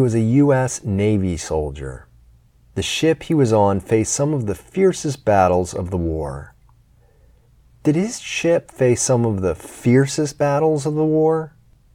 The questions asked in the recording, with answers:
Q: Did his ship face some of the fiercest battles of the war?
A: Yes, his ship faced some of the fiercest battles of the war.